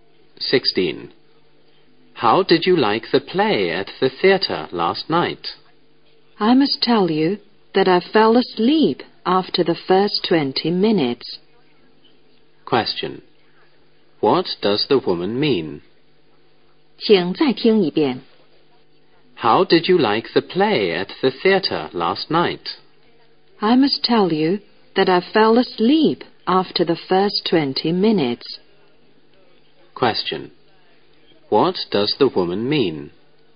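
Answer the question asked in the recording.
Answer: The play was boring; she didn't enjoy it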